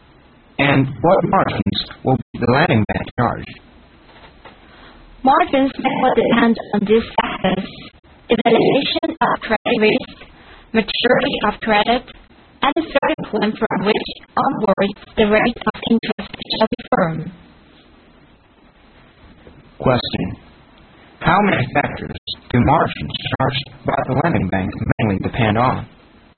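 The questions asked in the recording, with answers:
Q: How many factors do margins charged by the lending bank mainly depend on?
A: Three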